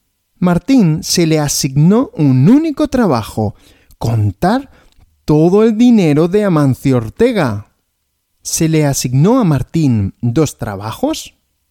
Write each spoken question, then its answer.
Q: ¿Se le asignó a Martín dos trabajos?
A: No, dos trabajos no, solo uno.